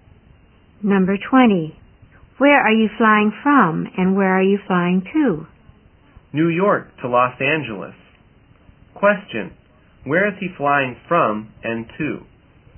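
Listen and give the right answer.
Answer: From New York to Los Angeles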